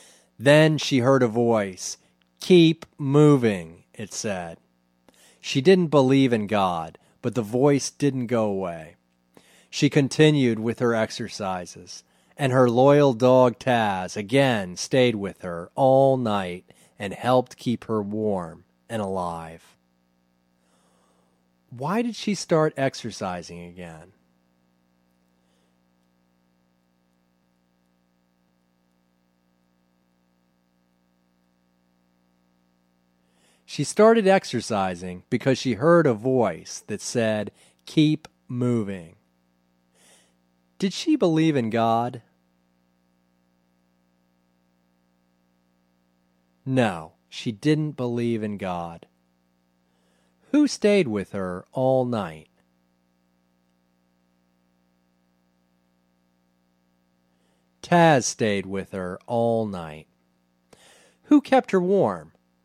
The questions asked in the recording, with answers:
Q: Why did she start exercising again?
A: She started exercising because she heard a voice that said, "Keep moving."

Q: Did she believe in God?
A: No, she didn't believe in God.

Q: Who kept her warm?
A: Taz kept her warm.